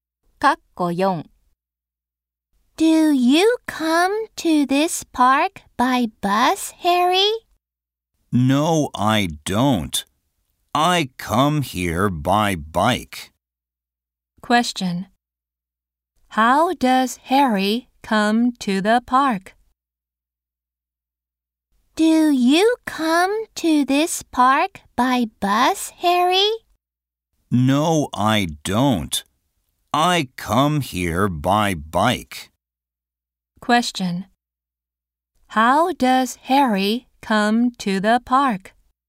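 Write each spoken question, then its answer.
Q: How does Harry come to the park?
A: By bike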